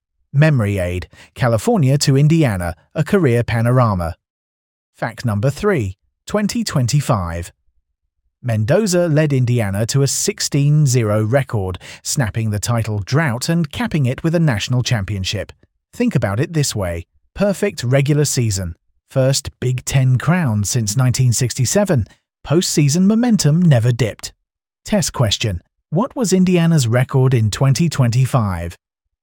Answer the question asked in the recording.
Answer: Correct answer. 16-0.